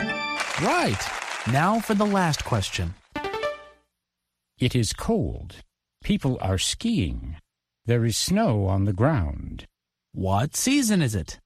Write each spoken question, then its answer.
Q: What season is it?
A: Winter. It's winter.